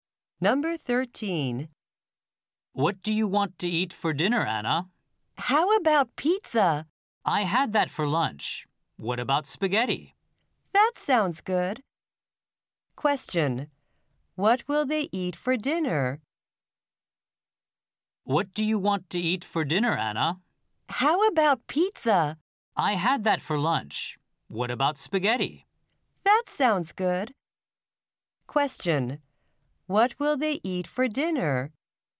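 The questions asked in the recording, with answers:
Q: What will they eat for dinner?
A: Spaghetti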